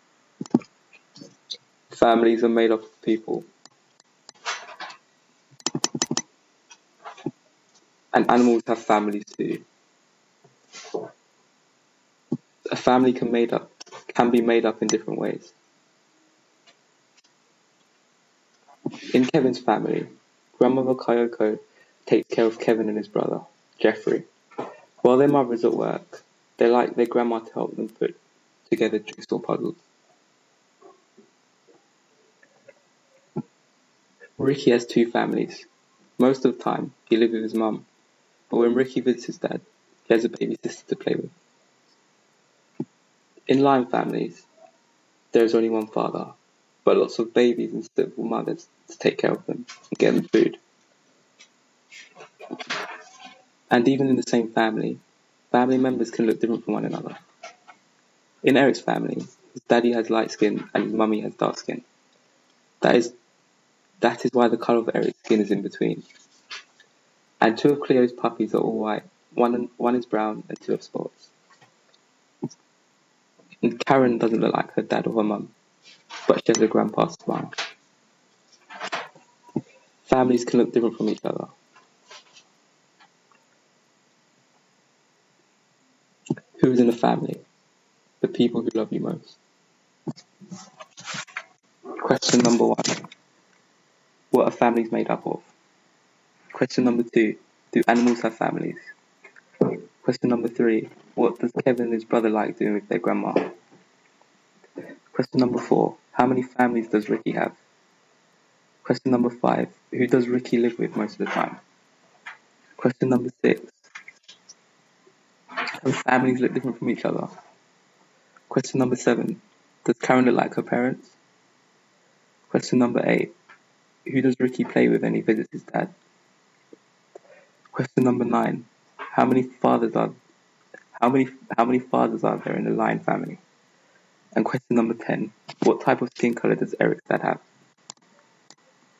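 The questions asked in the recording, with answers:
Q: What are families made up of?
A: People

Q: do animals have families?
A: Yes

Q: what does Kevin and his brother like doing with their grandma?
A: Putting together jigsaw puzzles

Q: how many families does Ricky have?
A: Two

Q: who does Ricky live with most of the time?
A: His mum

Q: does Karen look like her parents?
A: No, but she has her grandpa's smile

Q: who does Ricky play with when he visits his dad?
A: His baby sister

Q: how many fathers are there in the Lion family?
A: One

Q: what type of skin colour does Eric's dad have?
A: Light skin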